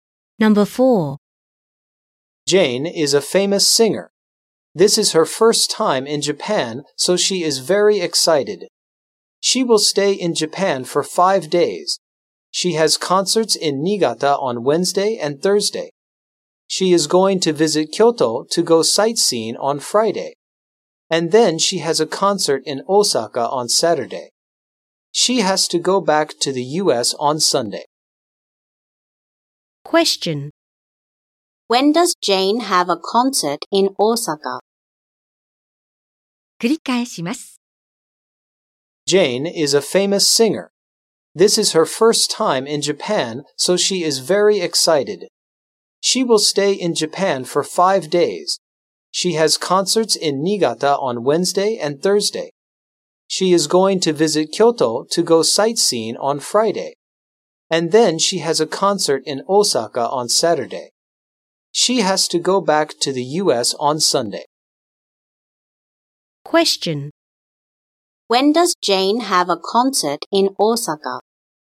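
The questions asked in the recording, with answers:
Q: When does Jane have a concert in Osaka?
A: On Saturday.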